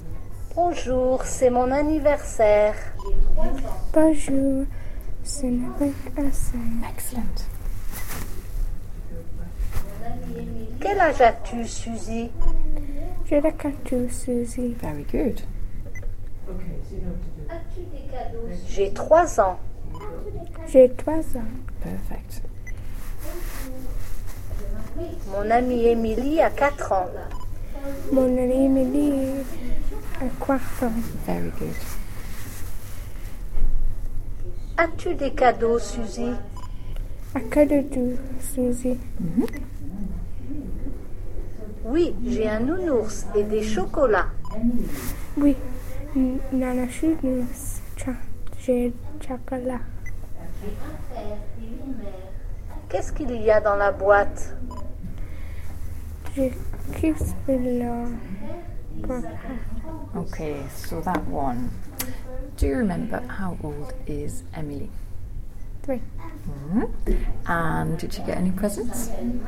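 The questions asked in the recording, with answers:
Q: And did you get any presents?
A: Yes, a teddy bear and chocolates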